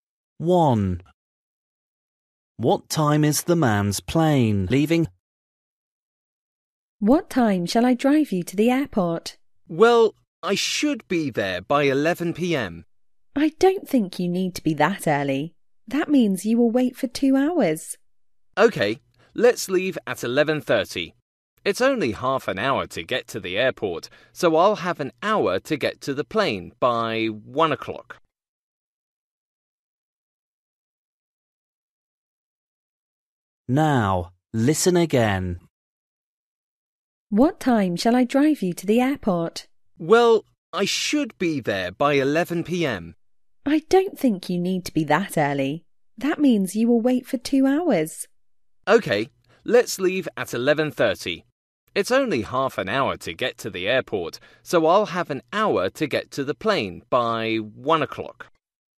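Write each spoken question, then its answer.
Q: What time is the man's plane leaving?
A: 1 o'clock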